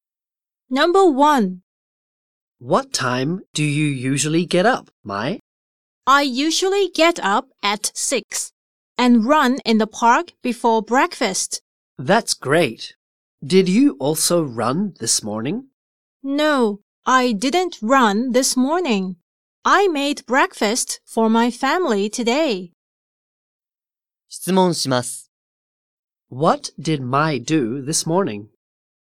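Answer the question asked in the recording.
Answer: She made breakfast for her family.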